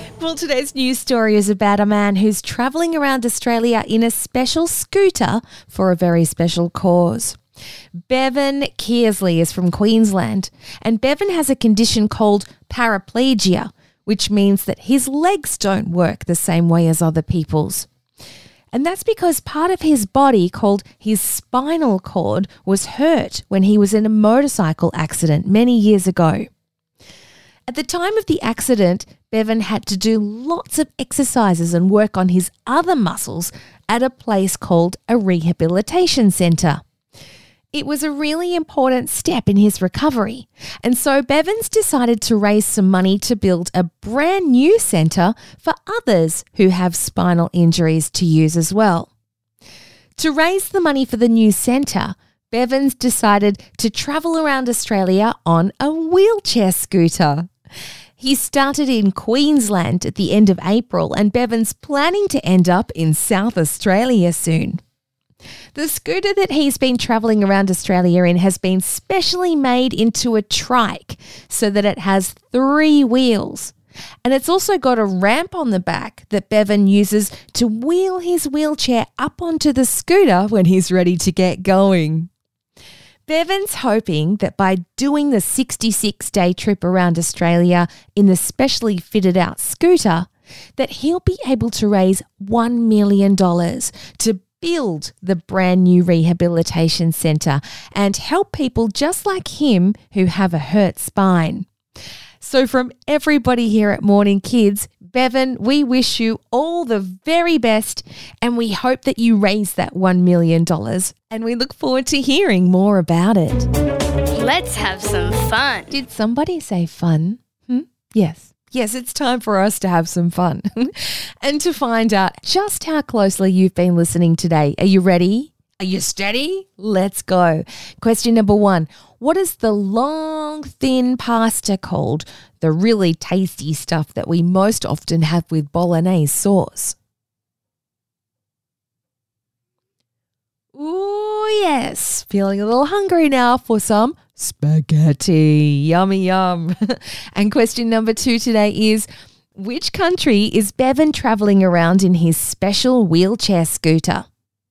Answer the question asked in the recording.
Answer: Yes, Australia. That's correct.